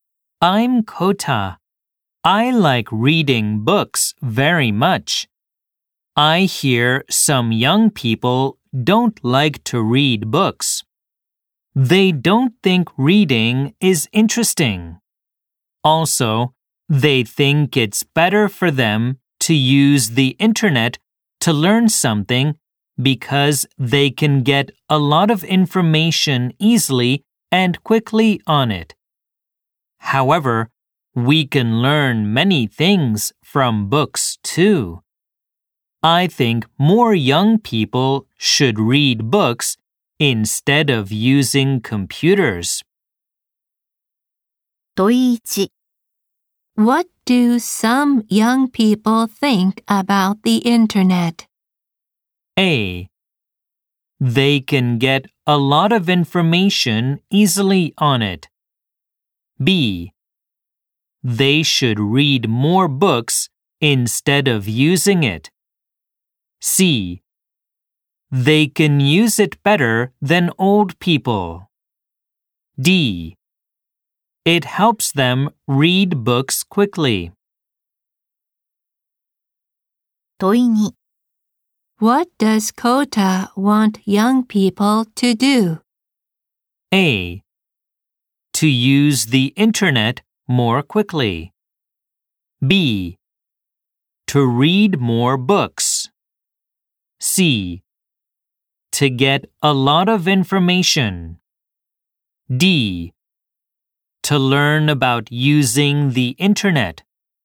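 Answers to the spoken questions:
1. A: They can get a lot of information easily on it.
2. B: To read more books.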